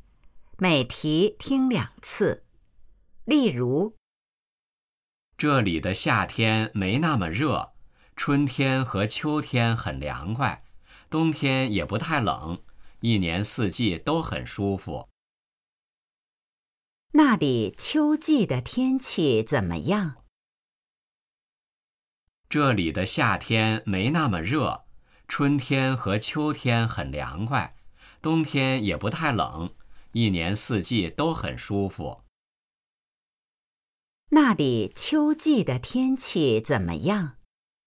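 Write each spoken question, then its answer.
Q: 那里秋季的天气怎么样?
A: 很凉快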